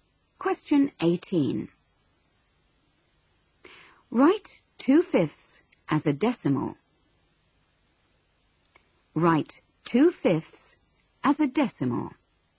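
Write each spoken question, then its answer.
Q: Write 2/5 as a decimal.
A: 0.4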